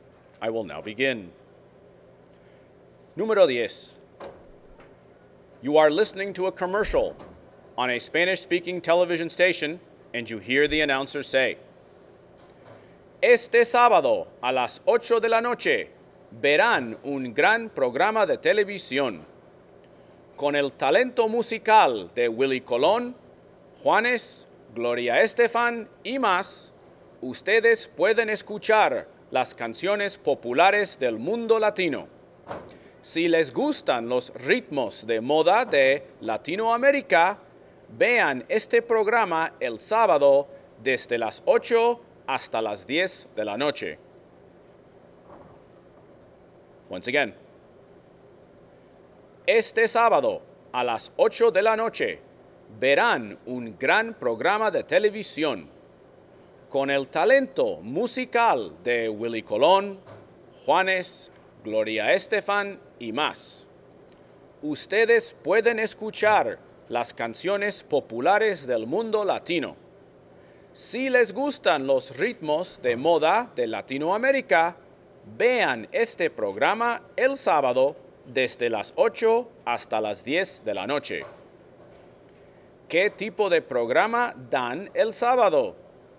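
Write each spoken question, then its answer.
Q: ¿Qué tipo de programa dan el sábado?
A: Un programa de música latina popular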